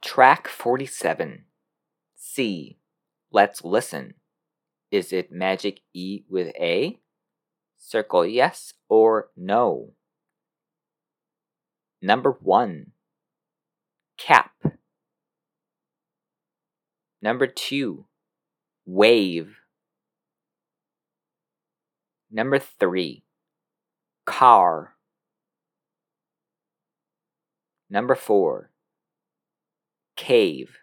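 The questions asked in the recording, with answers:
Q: Is it magic E with A? Circle yes or no. Number 1. Cap.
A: no

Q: Number 2. Wave.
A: yes

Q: Number 3. Car.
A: no

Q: Number 4. Cave.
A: yes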